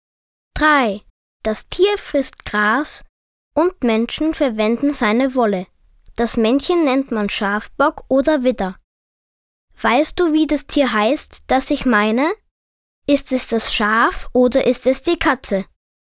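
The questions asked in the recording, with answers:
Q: Weißt du, wie das Tier heißt, das ich meine? Ist es das Schaf oder ist es die Katze?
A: das Schaf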